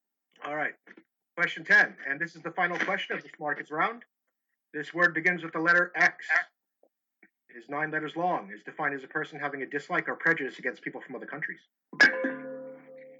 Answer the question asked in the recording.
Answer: It is xenophobe.